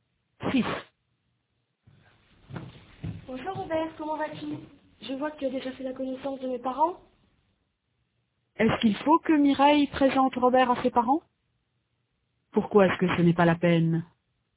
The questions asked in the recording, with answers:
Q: Pourquoi est-ce que ce n'est pas la peine?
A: Parce qu'il a déjà fait leur connaissance.